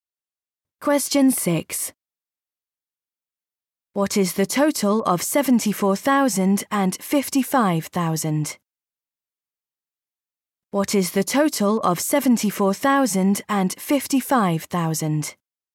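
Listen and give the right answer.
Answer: 129,000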